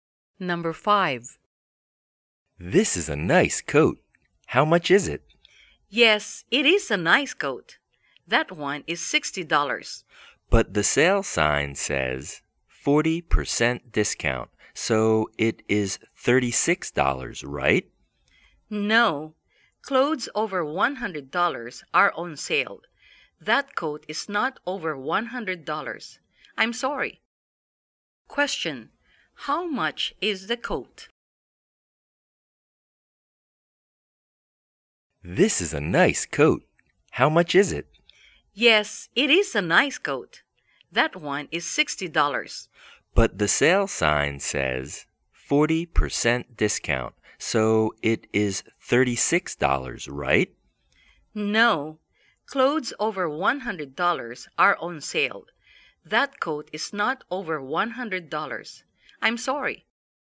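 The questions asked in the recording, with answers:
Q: Question, how much is the coat?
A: $60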